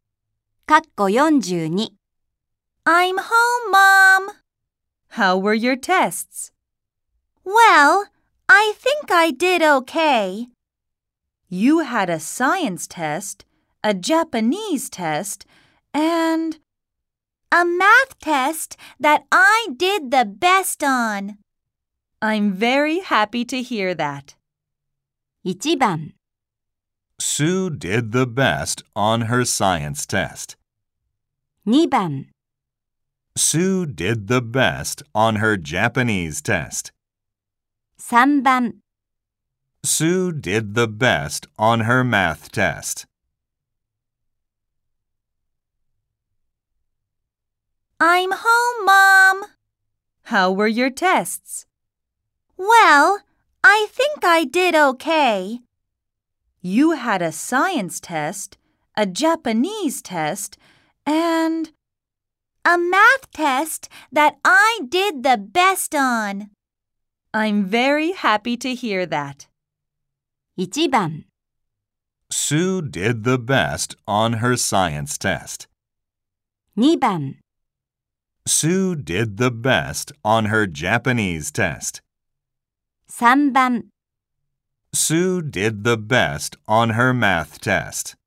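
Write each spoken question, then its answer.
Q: 1番 Sue did the best on her science test. 2番 Sue did the best on her Japanese test. 3番 Sue did the best on her math test.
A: 3: Sue did the best on her math test.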